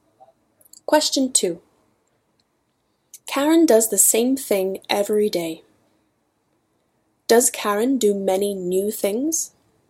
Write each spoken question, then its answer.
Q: Does Karen do many new things?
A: No, Karen does the same thing every day.